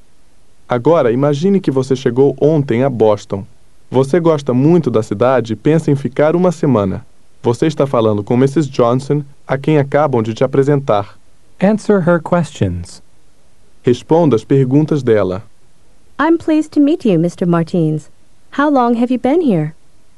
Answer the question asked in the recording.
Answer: Since yesterday.